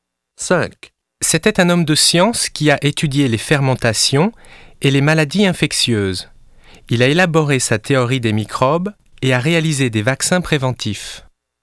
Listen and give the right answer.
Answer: C'est Louis Pasteur. Il est du XIXe siècle.